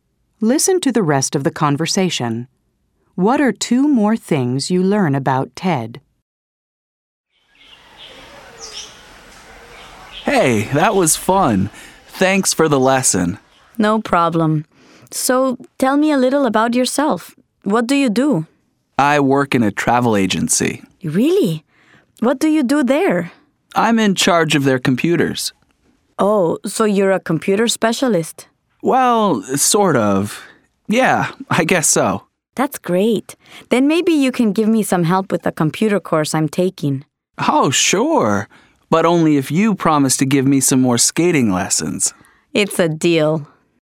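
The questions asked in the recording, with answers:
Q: What are two more things you learn about Ted?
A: He works in a travel agency and is in charge of its computers (a kind of computer specialist).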